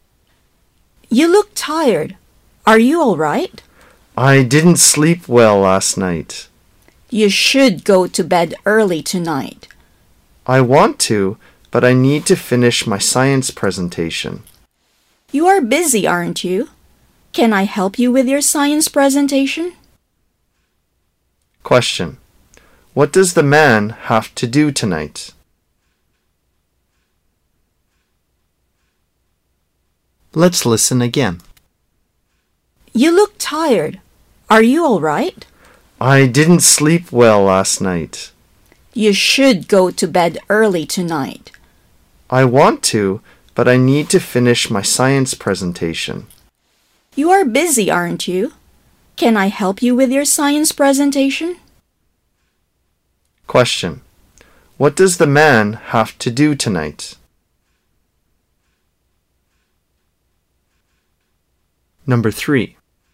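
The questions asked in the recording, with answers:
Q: What does the man have to do tonight?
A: Finish his science presentation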